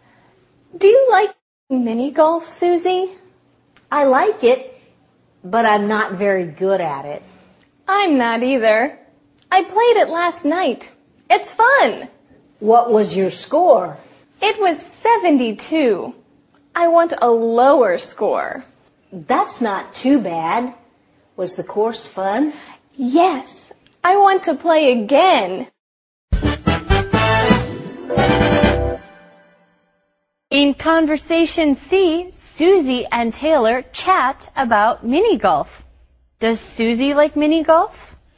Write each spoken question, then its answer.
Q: Does Susie like mini golf?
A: Well, Susie says that she does like mini golf, but she's not very good at it.